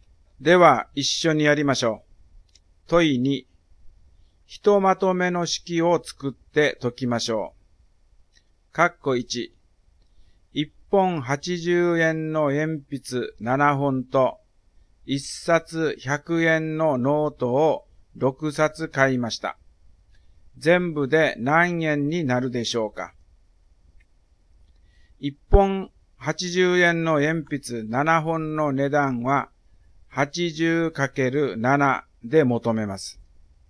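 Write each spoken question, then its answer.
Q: 全部で何円になるでしょうか。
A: 1160円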